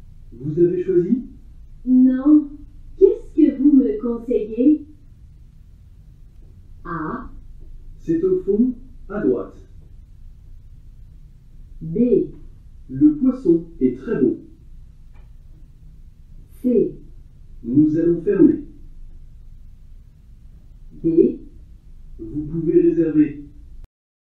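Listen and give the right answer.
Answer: B: Le poisson est très beau.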